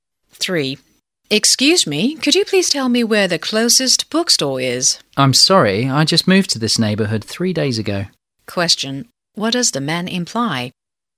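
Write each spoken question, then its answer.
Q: What does the man imply?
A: He doesn't know where the closest bookstore is, because he's new to the neighborhood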